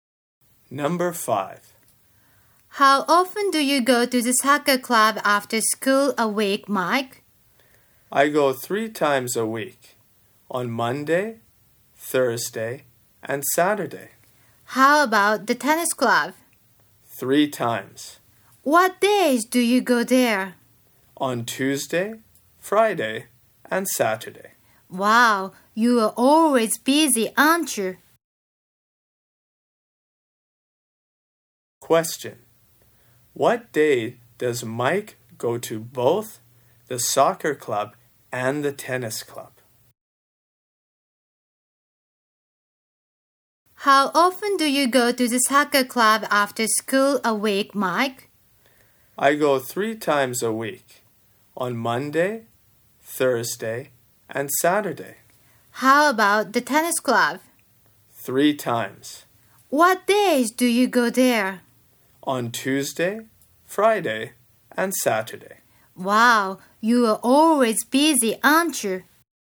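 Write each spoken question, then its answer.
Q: What day does Mike go to both the soccer club and the tennis club?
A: Saturday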